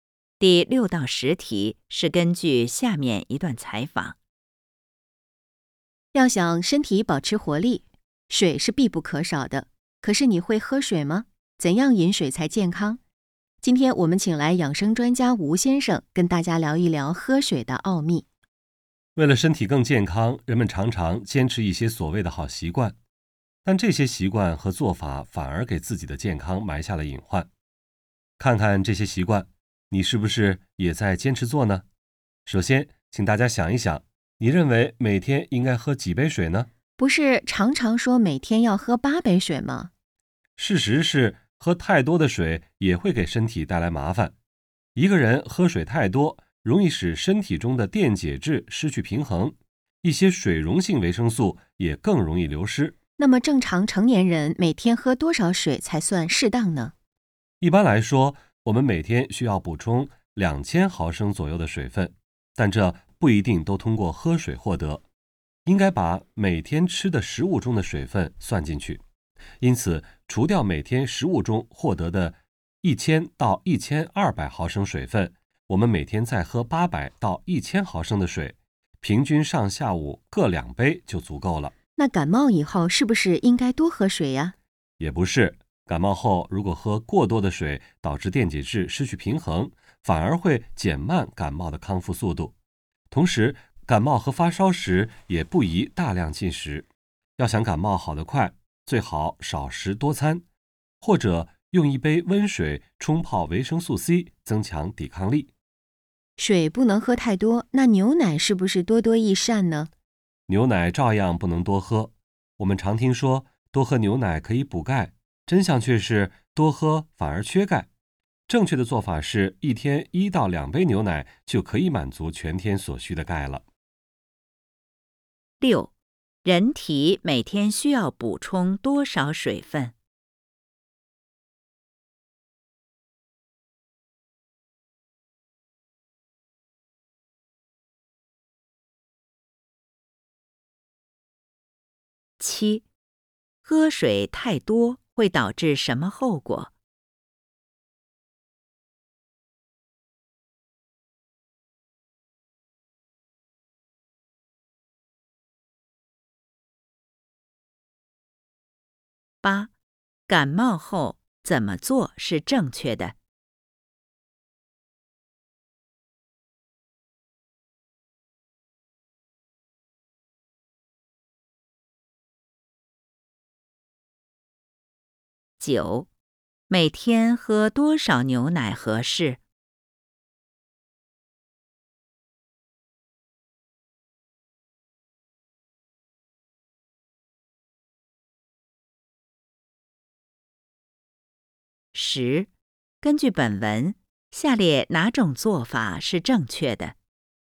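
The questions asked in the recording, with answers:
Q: 人体每天需要补充多少水分?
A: 2000毫升左右

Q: 喝水太多会导致什么后果?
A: 电解质失去平衡,水溶性维生素更容易流失

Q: 感冒后怎么做是正确的?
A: 少食多餐,或用温水冲泡维生素C

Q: 每天喝多少牛奶合适?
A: 1到2杯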